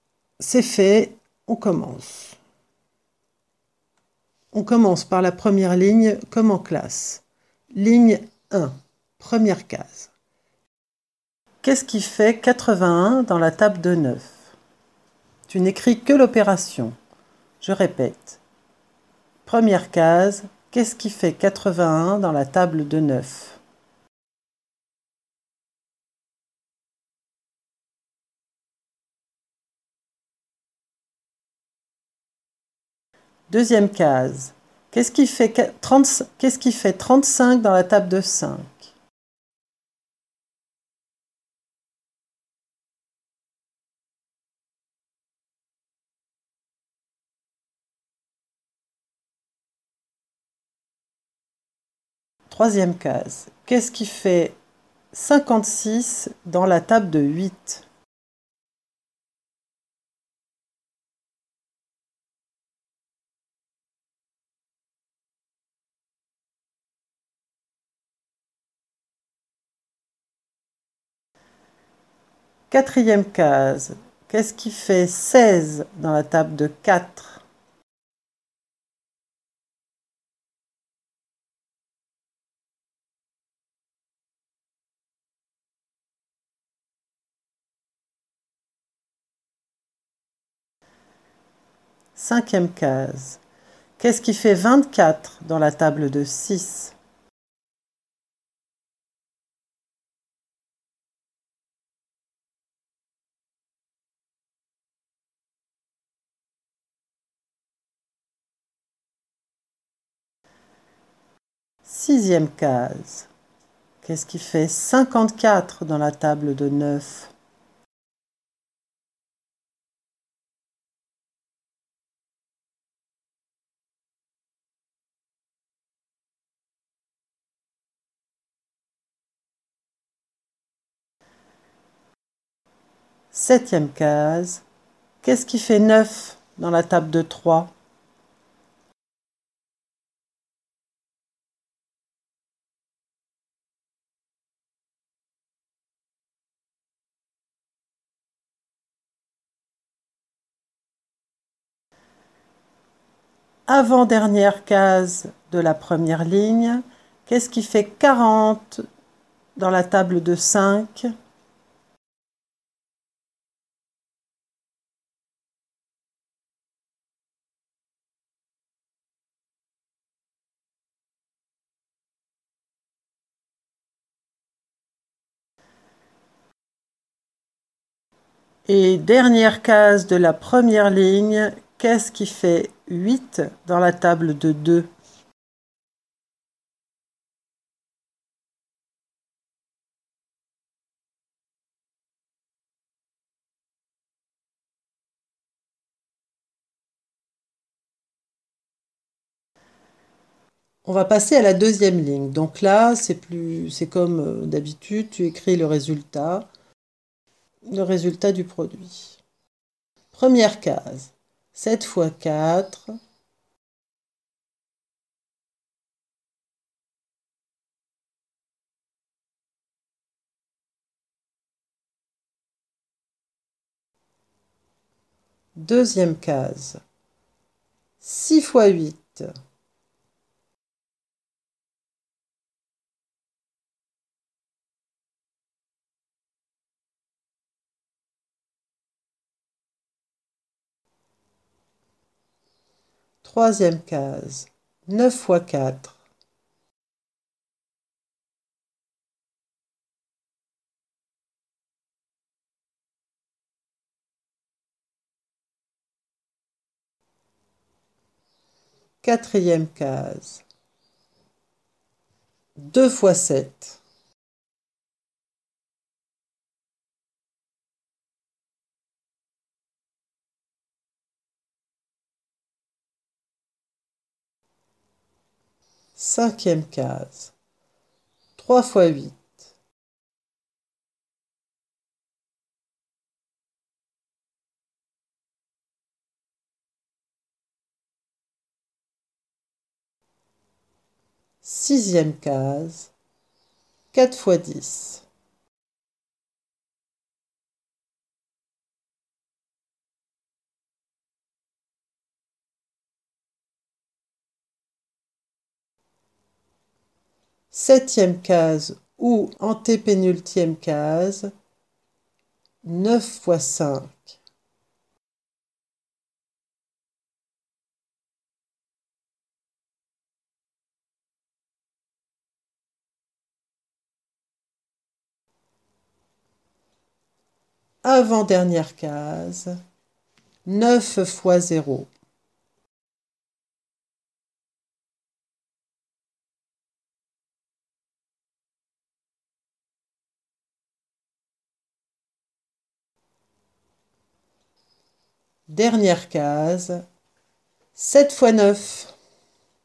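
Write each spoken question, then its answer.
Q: Qu'est-ce qui fait 81 dans la table de 9?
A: 9 × 9

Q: Deuxième case, qu'est-ce qui fait 35 dans la table de 5?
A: 7 × 5

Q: Troisième case, qu'est-ce qui fait 56 dans la table de 8?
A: 7 × 8

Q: Quatrième case, qu'est-ce qui fait 16 dans la table de 4?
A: 4 × 4

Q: Cinquième case, qu'est-ce qui fait 24 dans la table de 6?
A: 4 × 6

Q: Sixième case, qu'est-ce qui fait 54 dans la table de 9?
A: 6 × 9

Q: Septième case, qu'est-ce qui fait 9 dans la table de 3?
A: 3 × 3

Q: Avant-dernière case de la première ligne, qu'est-ce qui fait 40 dans la table de 5?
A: 8 × 5

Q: Et dernière case de la première ligne, qu'est-ce qui fait 8 dans la table de 2?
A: 4 × 2

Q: Première case, 7 fois 4.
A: 28

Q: Deuxième case, 6 fois 8.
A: 48

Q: Troisième case, 9 fois 4.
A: 36

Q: Quatrième case, 2 fois 7.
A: 14

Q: Cinquième case, 3 fois 8.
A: 24

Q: Sixième case, 4 fois 10.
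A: 40

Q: Septième case ou antépénultième case, 9 fois 5.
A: 45

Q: Dernière case, 7 fois 9.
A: 63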